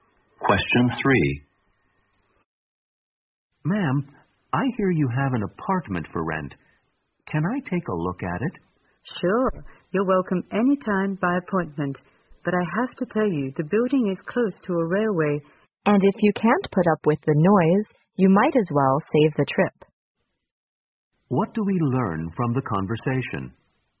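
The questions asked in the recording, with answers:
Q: What do we learn from the conversation?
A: The apartment may be noisy because it is close to a railway.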